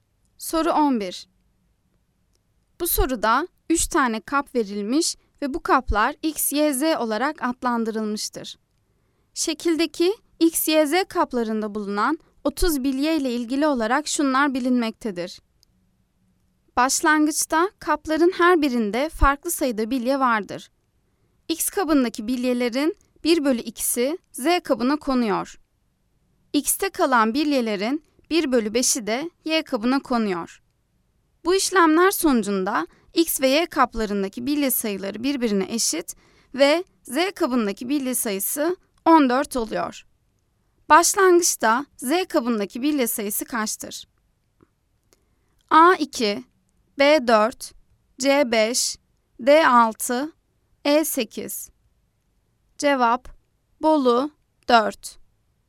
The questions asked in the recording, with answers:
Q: Başlangıçta Z kabındaki bilye sayısı kaçtır?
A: Cevap, bolu 4.